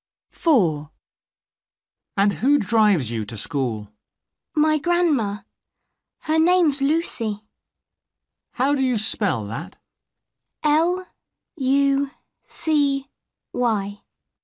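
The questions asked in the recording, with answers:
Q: And who drives you to school?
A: Lucy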